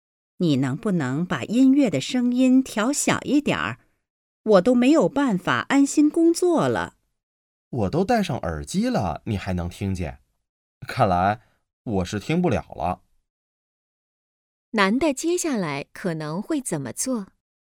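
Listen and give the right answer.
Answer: 不听音乐了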